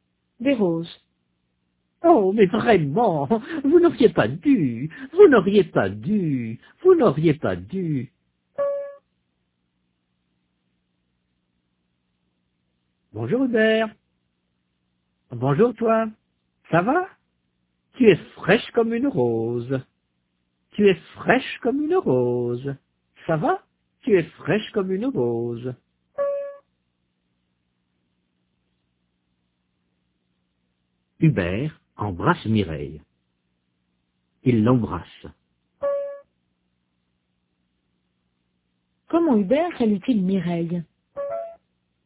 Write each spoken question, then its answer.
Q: Comment Hubert salue-t-il Mireille?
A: Il l'embrasse.